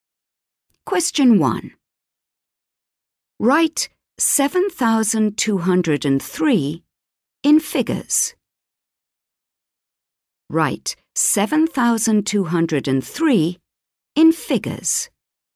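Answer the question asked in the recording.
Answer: 7203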